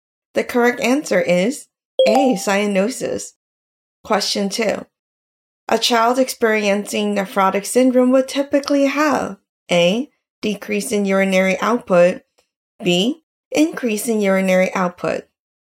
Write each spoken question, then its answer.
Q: A child experiencing nephrotic syndrome would typically have A, decrease in urinary output, B, increase in urinary output.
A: The correct answer is A, decrease in urinary output.